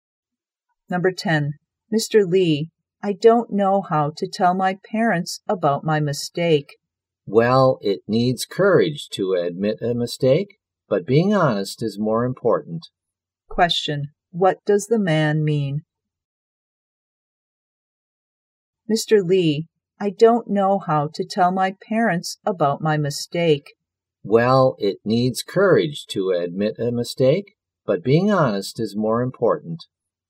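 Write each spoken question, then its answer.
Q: What does the man mean?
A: She should be honest and tell her parents about the mistake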